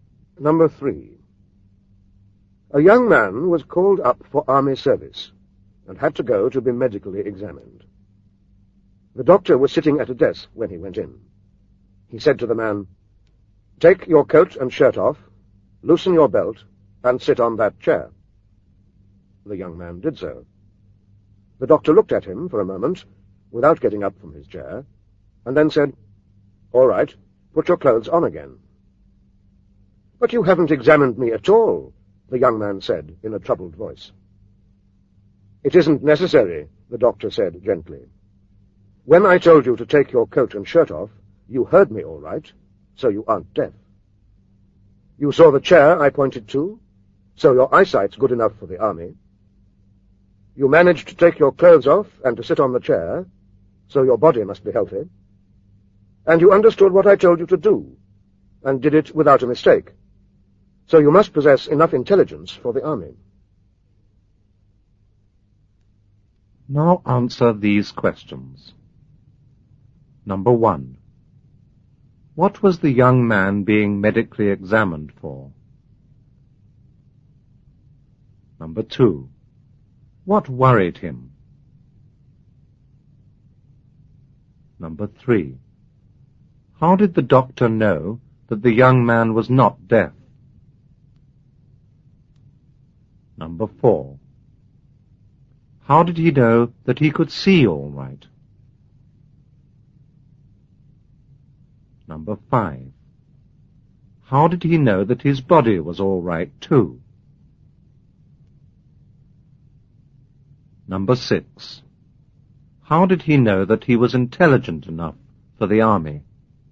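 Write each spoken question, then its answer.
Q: What was the young man being medically examined for?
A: Army service

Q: What worried him?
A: The doctor didn't examine him at all

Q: How did the doctor know that the young man was not deaf?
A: He heard the order to take his coat and shirt off

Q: How did he know that he could see all right?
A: He saw the chair the doctor pointed to

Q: How did he know that his body was all right too?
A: He managed to take his clothes off and sit on the chair

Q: How did he know that he was intelligent enough for the army?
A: He understood the instructions and followed them without a mistake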